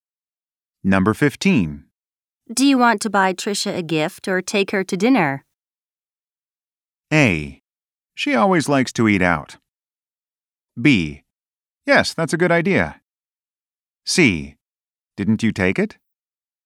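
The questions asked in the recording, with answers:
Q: Do you want to buy Tricia a gift or take her to dinner?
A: A: She always likes to eat out.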